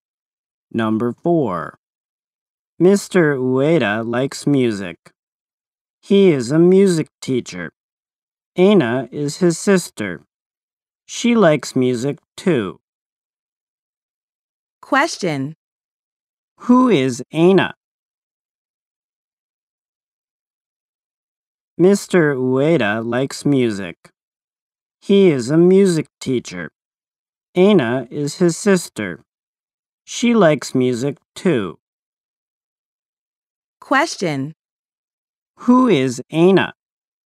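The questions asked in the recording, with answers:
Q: Who is Aina?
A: Mr. Ueda's sister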